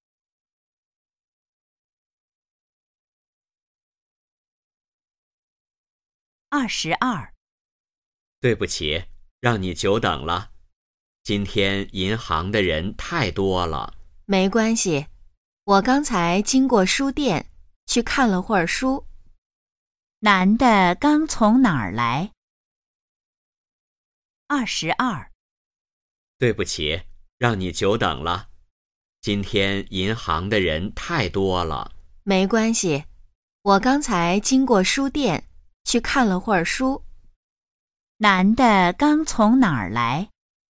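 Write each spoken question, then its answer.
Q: 男的刚从哪儿来?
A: 书店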